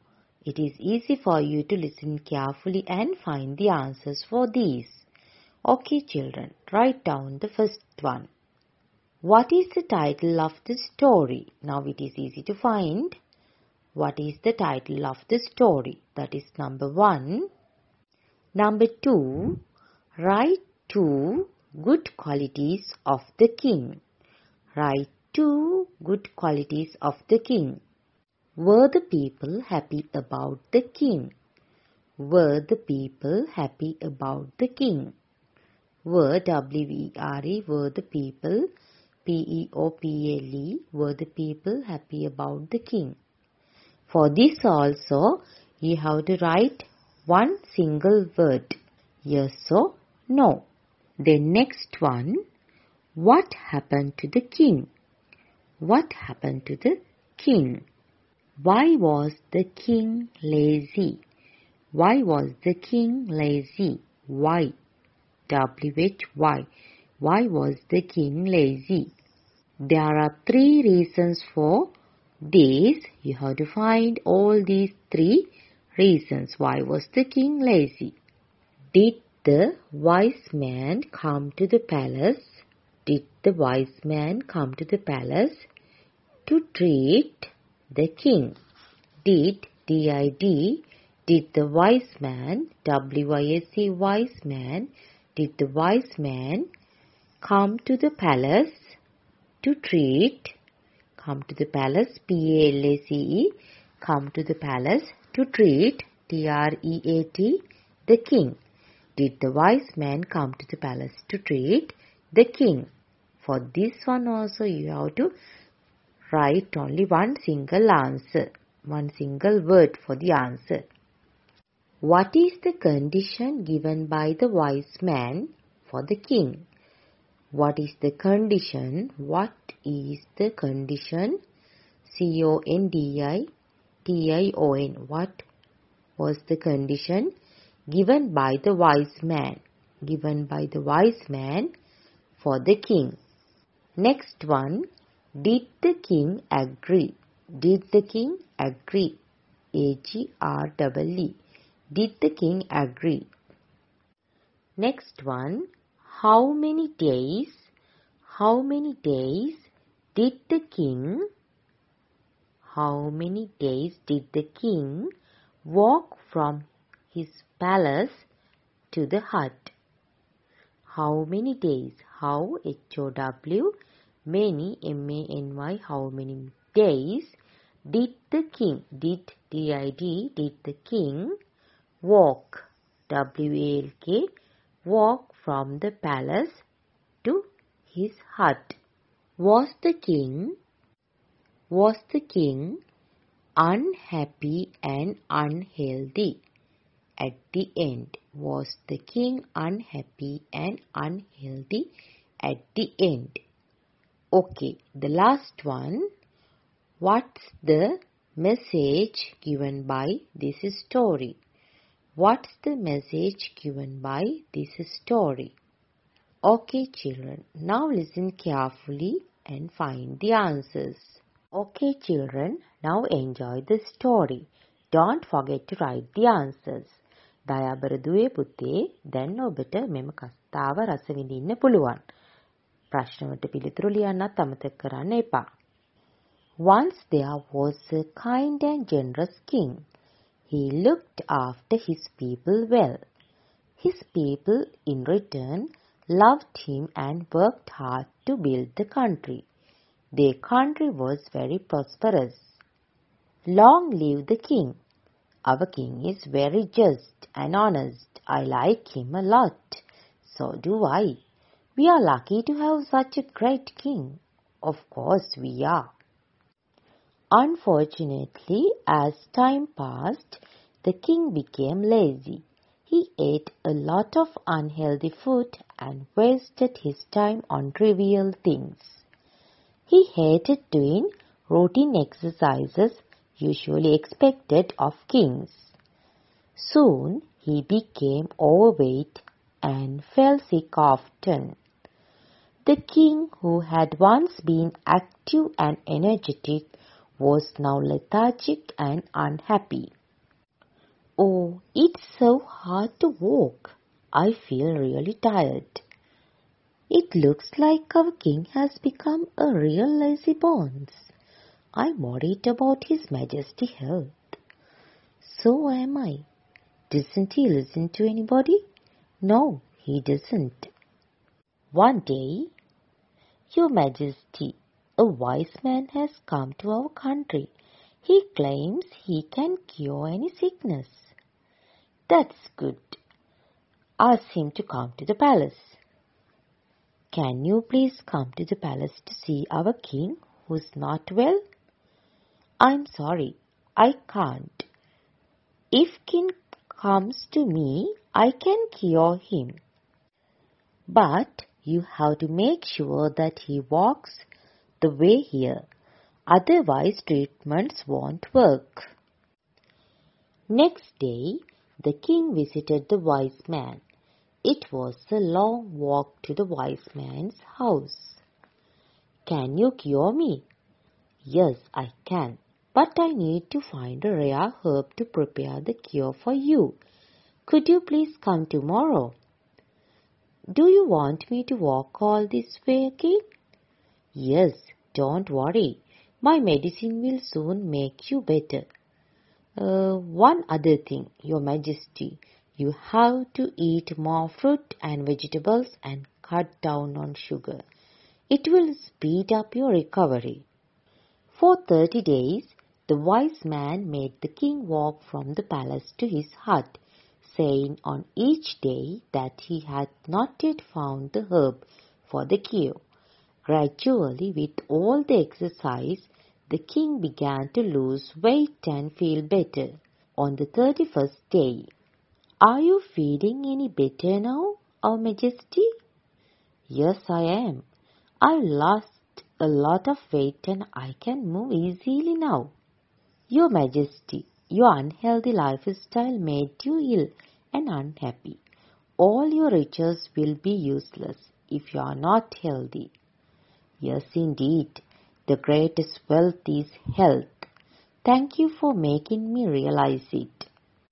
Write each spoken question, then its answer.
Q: write two good qualities of the king.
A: Kind and generous.

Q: Did the wise man come to the palace to treat the king?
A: No, he didn't agree.

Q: What is the condition given by the wise man for the king?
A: he asked the king to walk to his hut.

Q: Did the king agree?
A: Yes, the king agreed.

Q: How many days did the king walk from his palace to the hut?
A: for 30 days.

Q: Was the king unhappy and unhealthy at the end?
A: No. He lost a lot of weight and he became healthy and happy.

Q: What's the message given by this story?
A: Yes, the greatest wealth is health.